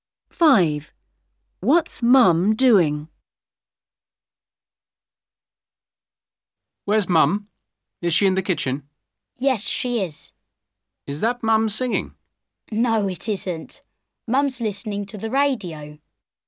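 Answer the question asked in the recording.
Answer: Listening to the radio in the kitchen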